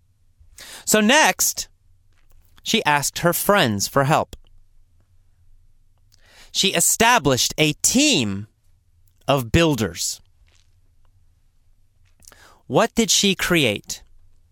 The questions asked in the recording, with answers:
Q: What did she create?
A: Well, she created a team of builders, a building team.